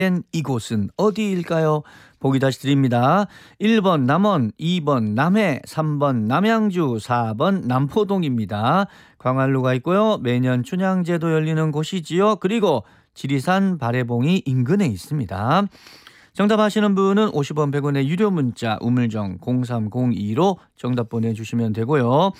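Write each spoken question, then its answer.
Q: 된 이곳은 어디일까요?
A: 1번: 남원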